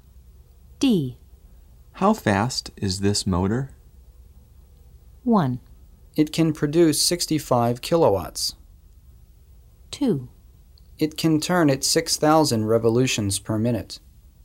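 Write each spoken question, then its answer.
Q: How fast is this motor?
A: 2: It can turn at 6,000 revolutions per minute.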